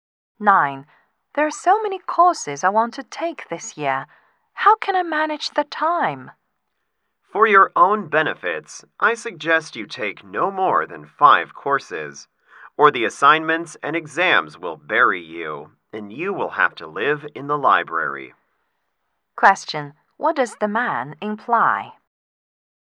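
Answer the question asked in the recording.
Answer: The woman should take no more than five courses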